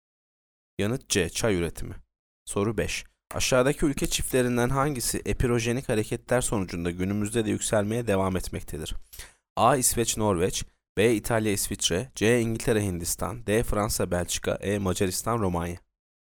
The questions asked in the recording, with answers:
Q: Aşağıdaki ülke çiftlerinden hangisi epirojenik hareketler sonucunda günümüzde de yükselmeye devam etmektedir?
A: Yanıt A. İsveç, Norveç.